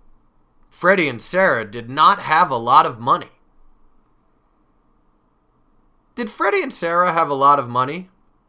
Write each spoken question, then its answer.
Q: Did Freddy and Sarah have a lot of money?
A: No, they did not. They did not have a lot of money.